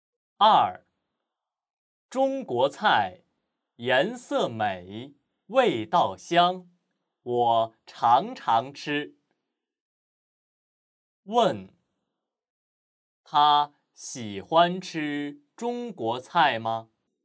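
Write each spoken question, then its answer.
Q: 问,他喜欢吃中国菜吗?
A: 喜欢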